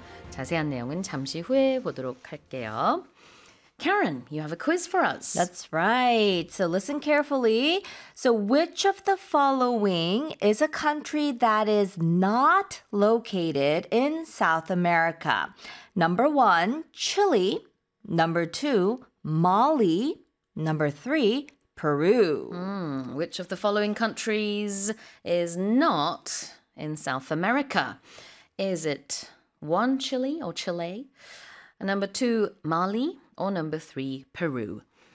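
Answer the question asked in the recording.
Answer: 2: Mali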